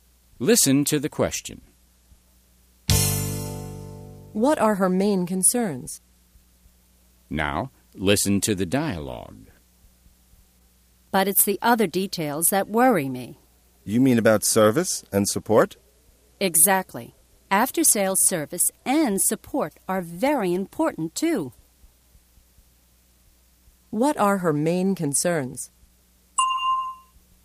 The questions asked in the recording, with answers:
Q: What are her main concerns?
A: Her main concerns are after-sales service and support.